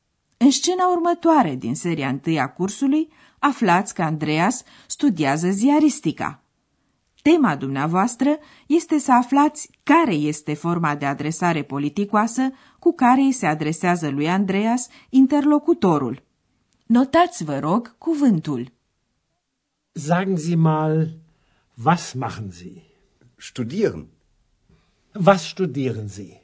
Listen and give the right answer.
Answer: Este zi, dumneavoastră.